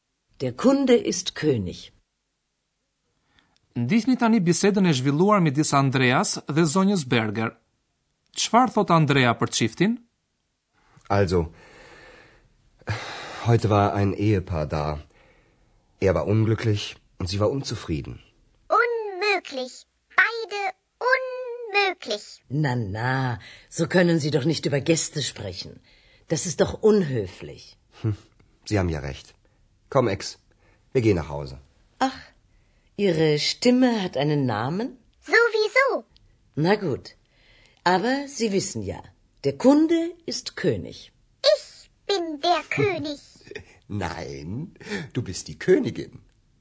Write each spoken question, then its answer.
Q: Çfarë thot Andrea për çiftin?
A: Andrea thot se buri ishte i dëshpruar dhe fatkeq, ndërsa gruaja e ti e pa nachur.